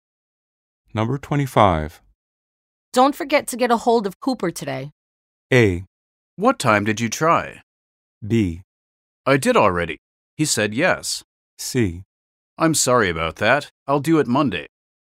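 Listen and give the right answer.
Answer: B: I did already. He said yes.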